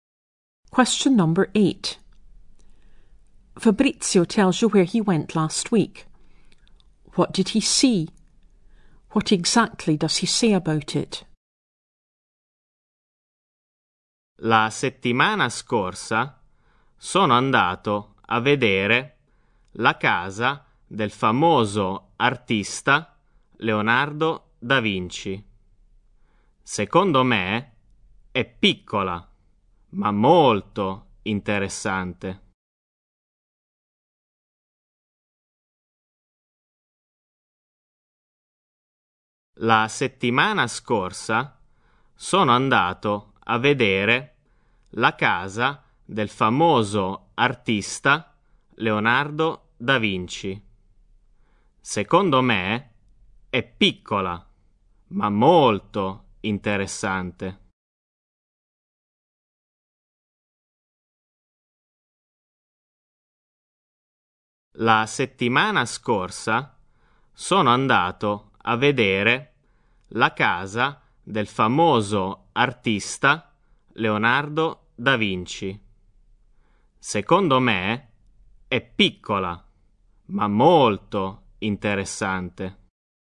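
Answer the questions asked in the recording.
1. The house of Leonardo da Vinci
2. It is small but very interesting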